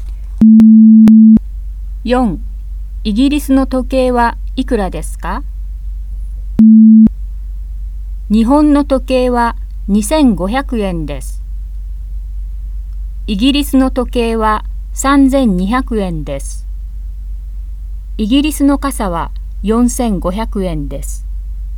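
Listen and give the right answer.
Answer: 3200円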